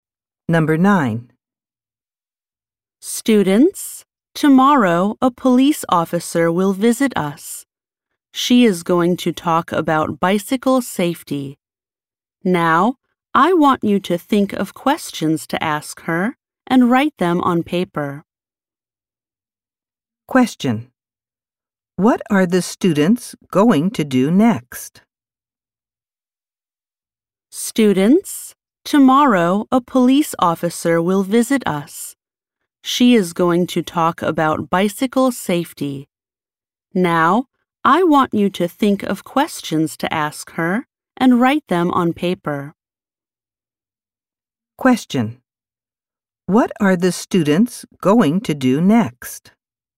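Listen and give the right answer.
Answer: Write questions for the police officer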